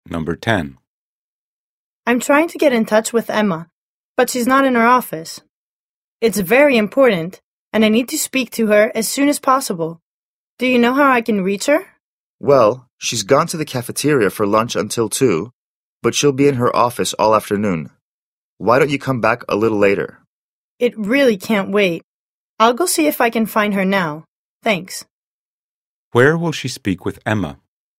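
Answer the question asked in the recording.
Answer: In the cafeteria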